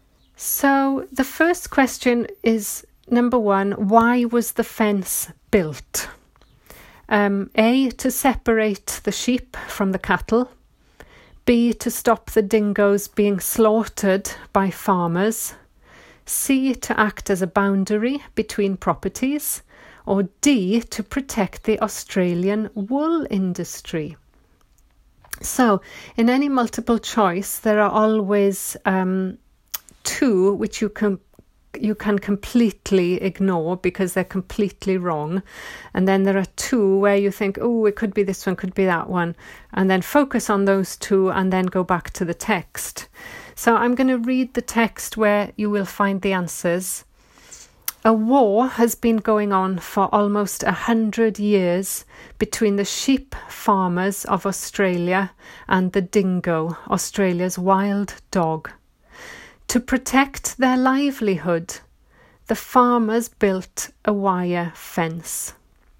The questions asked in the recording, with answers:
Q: why was the fence built?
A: So the answer, why was the fence built, is D, to protect the Australian wool industry.